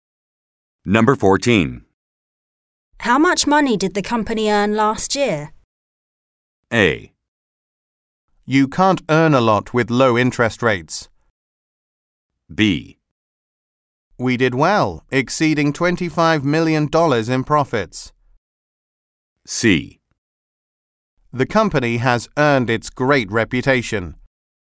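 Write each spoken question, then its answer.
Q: How much money did the company earn last year?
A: B: We did well, exceeding $25 million in profits.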